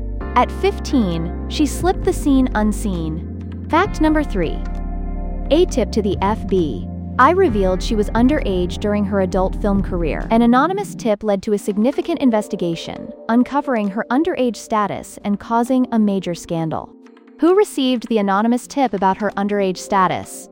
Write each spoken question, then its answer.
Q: Who received the anonymous tip about her underage status?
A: Correct answer, FBI.